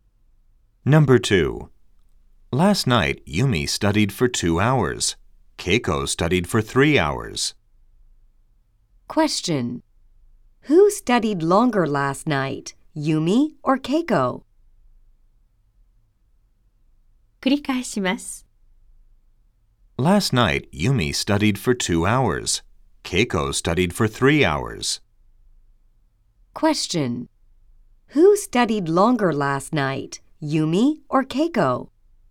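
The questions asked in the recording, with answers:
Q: Who studied longer last night, Yumi or Keiko?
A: Keiko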